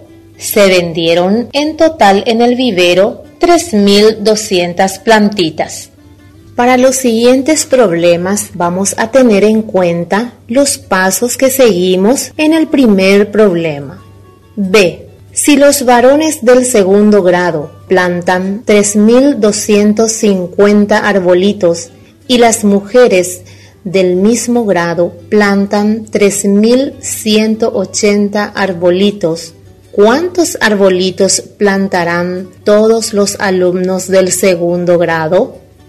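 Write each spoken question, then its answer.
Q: ¿Cuántos arbolitos plantarán todos los alumnos del segundo grado?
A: 6.430 arbolitos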